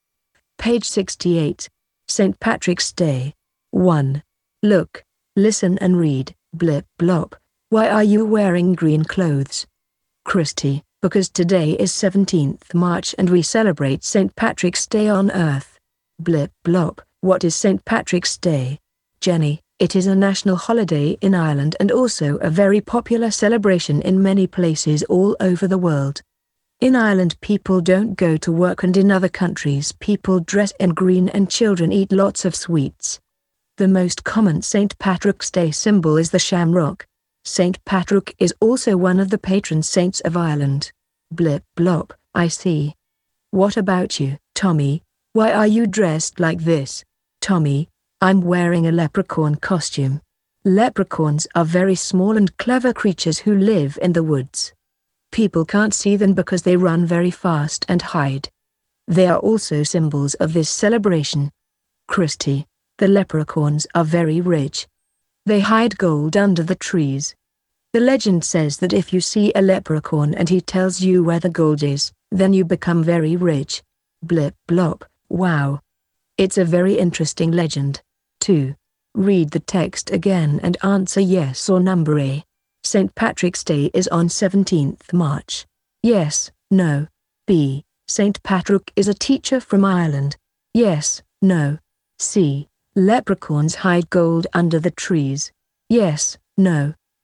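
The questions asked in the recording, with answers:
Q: St. Patrick's Day is on 17th March.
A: Yes

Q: St. Patrick is a teacher from Ireland.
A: No

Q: Leprechauns hide gold under the trees.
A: Yes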